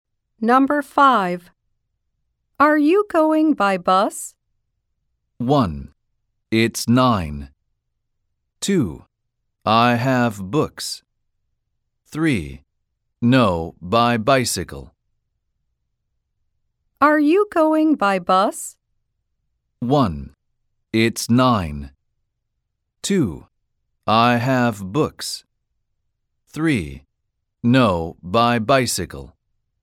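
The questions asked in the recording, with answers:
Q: Are you going by bus?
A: 3: No, by bicycle.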